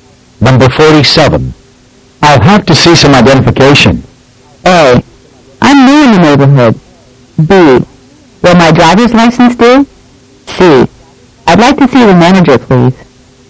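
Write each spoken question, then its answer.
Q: I'll have to see some identification.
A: B: Will my driver's license do?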